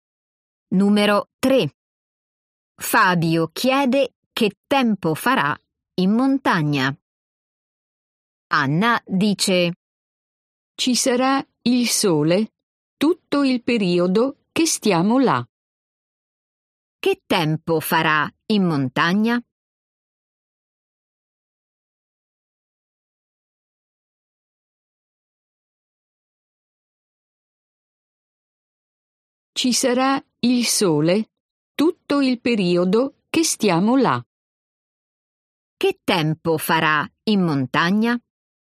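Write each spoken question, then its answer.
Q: Che tempo farà in montagna?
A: Ci sarà il sole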